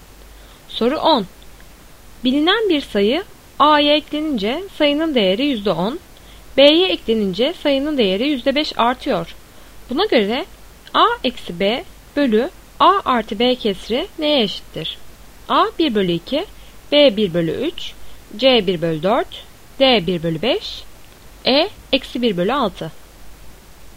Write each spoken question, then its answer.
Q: Buna göre A eksi B bölü A artı B kesri neye eşittir?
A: Doğru cevap B 1/3.